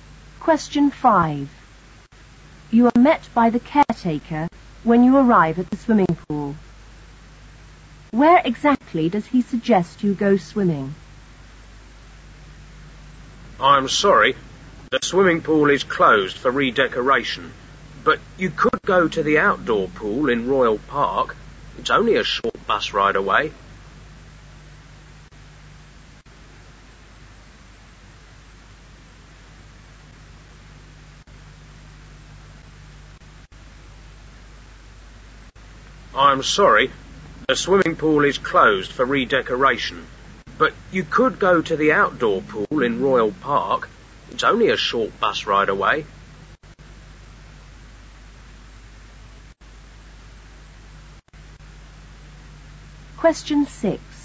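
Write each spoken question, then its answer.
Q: Where exactly does he suggest you go swimming?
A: The outdoor pool in Royal Park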